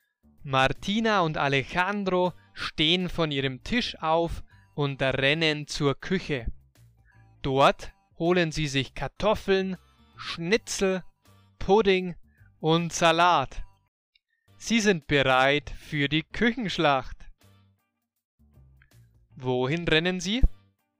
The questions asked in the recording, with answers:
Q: Wohin rennen sie?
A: Zur Küche.